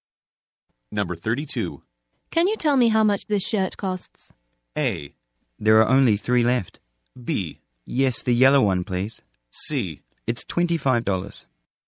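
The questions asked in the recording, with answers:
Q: Can you tell me how much this shirt costs?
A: C: It's $25.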